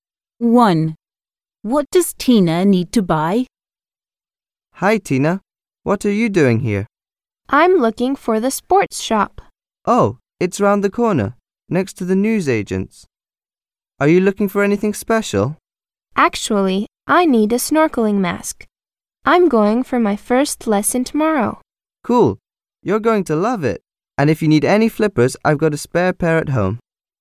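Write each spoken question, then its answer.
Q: What does Tina need to buy?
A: a snorkeling mask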